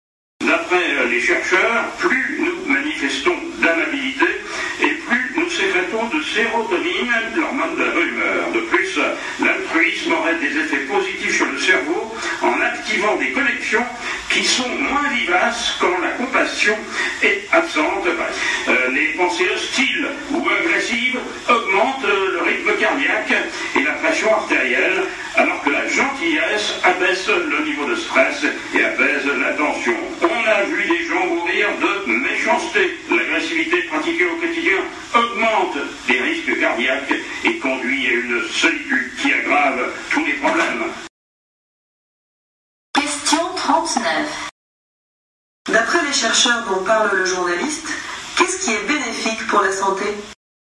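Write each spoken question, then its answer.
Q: D'après les chercheurs dont parle le journaliste, qu'est-ce qui est bénéfique pour la santé ?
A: La gentillesse (l'amabilité, l'altruisme)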